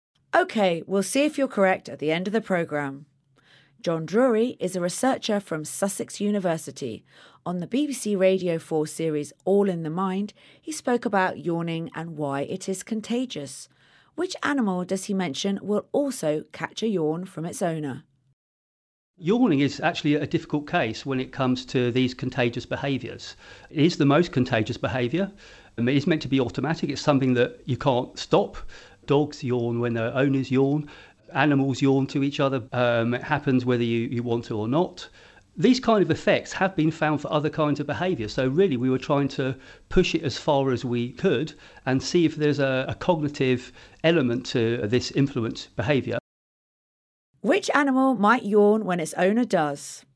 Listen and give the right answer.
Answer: Dogs. Dogs can catch a yawn from their owners.